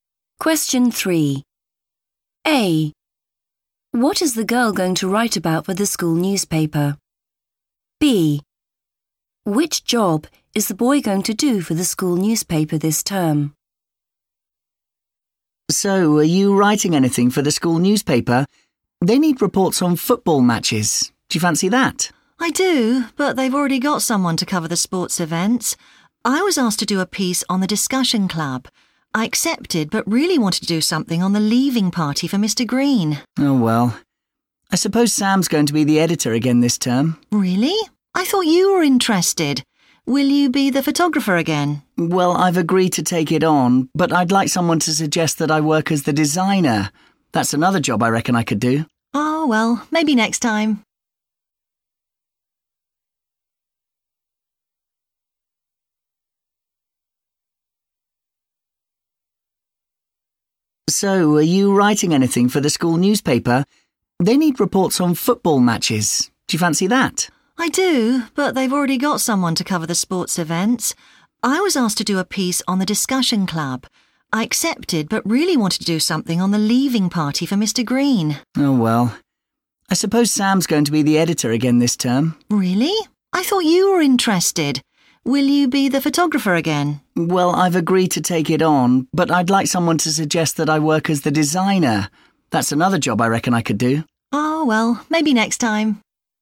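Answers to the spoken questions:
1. the discussion club
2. photographer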